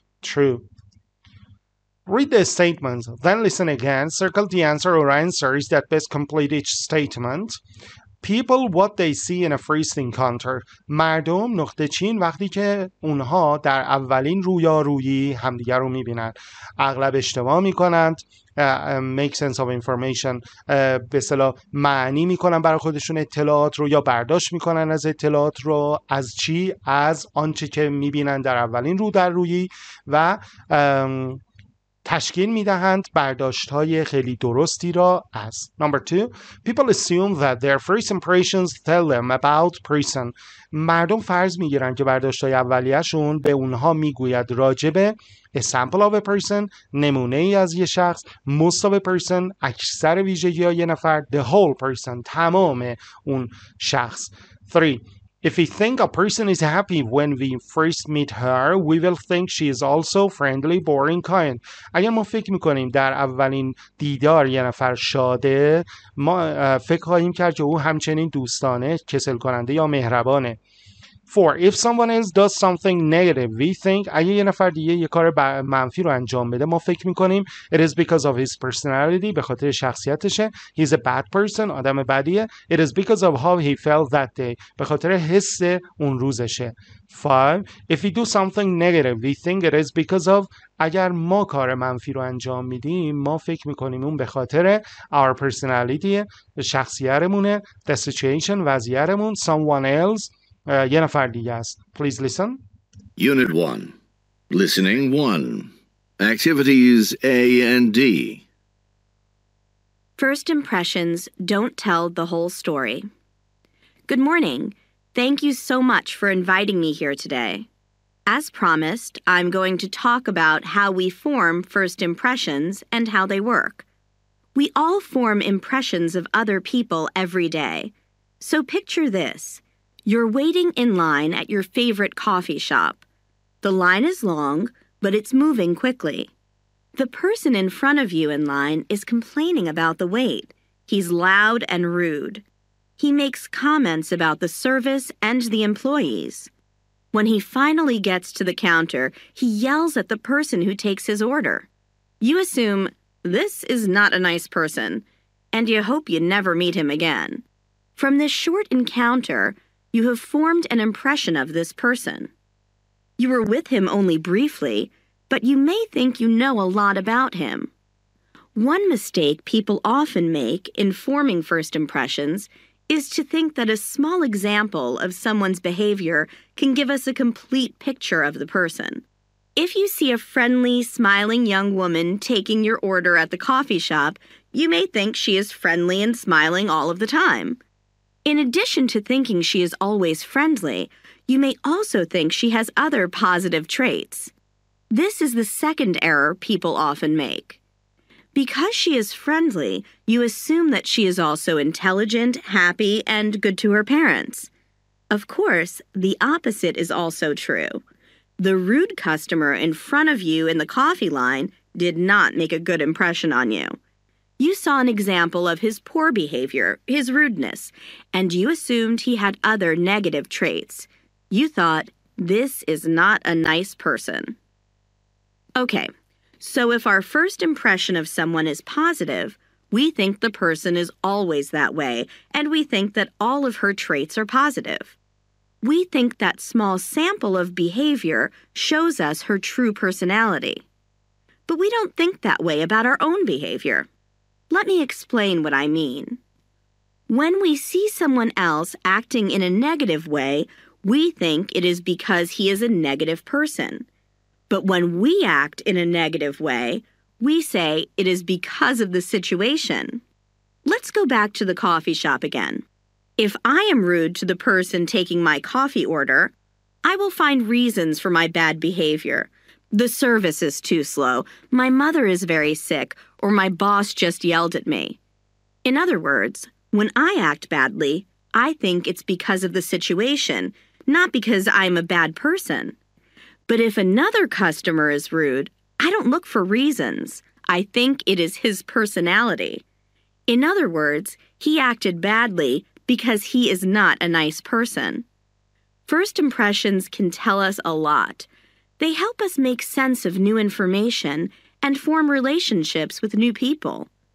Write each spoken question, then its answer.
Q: Number two, people assume that their first impressions tell them about person.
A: 2C

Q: 5. If we do something negative, we think it is because of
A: 5B